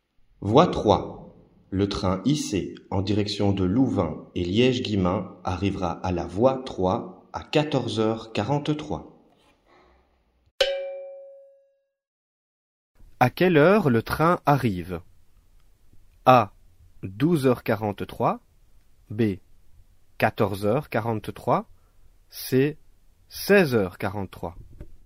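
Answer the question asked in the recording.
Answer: B: 14h43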